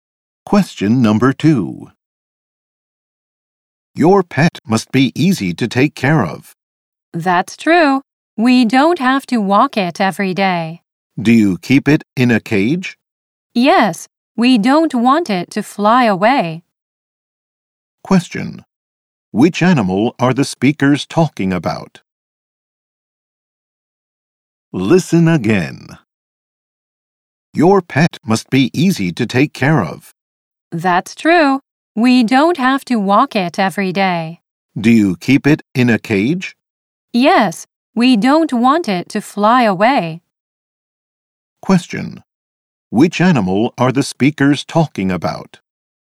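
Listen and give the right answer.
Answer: A bird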